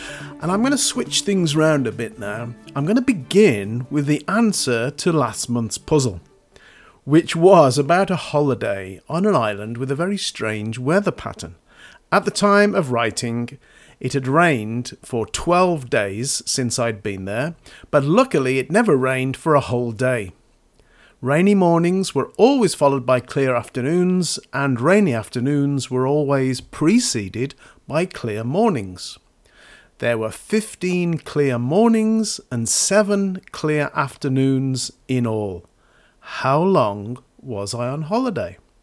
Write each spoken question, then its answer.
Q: How long was I on holiday?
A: That's the total number of half days, which is equivalent to 17 days in total.